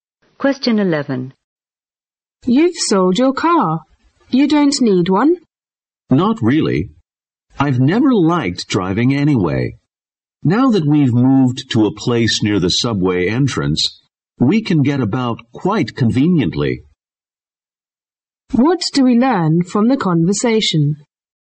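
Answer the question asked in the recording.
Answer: The man sold his car because he lives near the subway and can get about conveniently without it.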